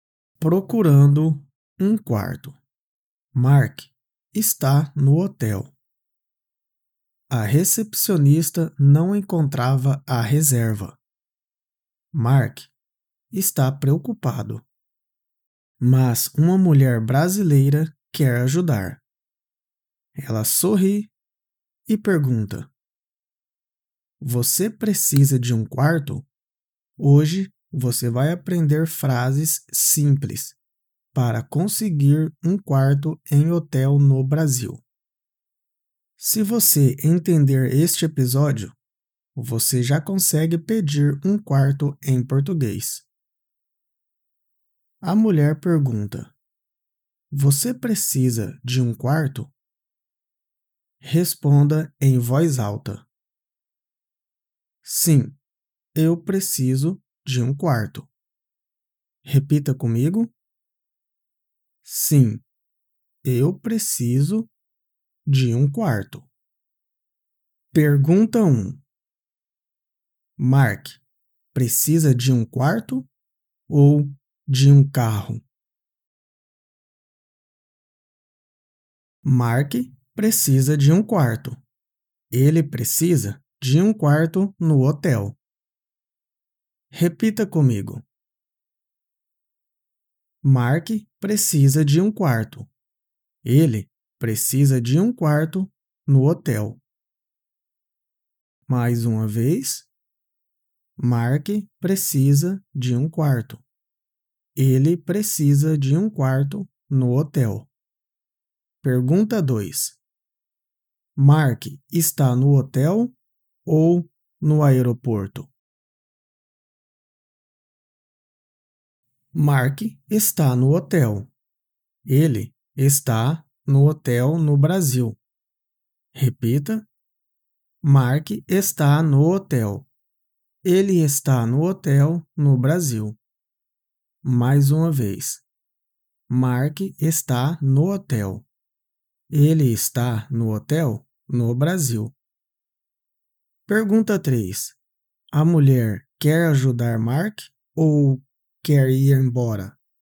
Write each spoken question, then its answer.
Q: Mark precisa de quarto ou de carro?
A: Mark precisa de quarto.

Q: Mark está no hotel ou no aeroporto?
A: Mark está no hotel.